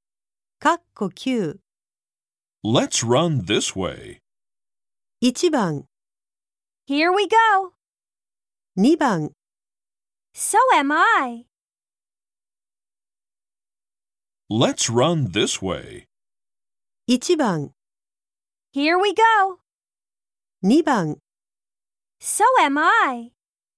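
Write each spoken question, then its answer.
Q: Let's run this way.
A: 1: Here we go.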